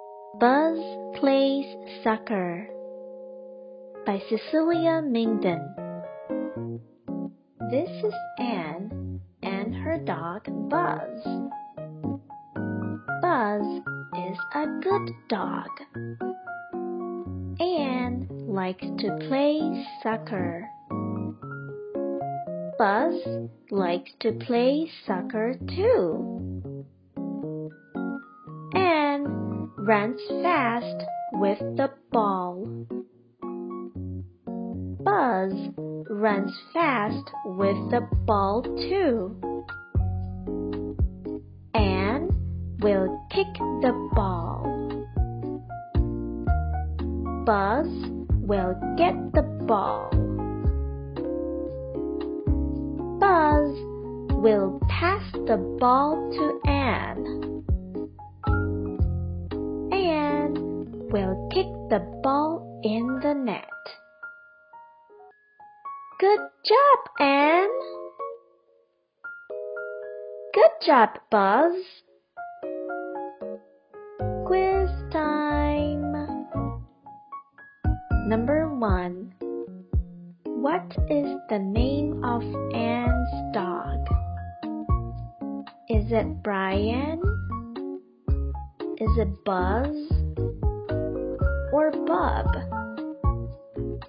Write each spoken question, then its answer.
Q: What is the name of Ann's dog?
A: That's right. The answer is Buzz.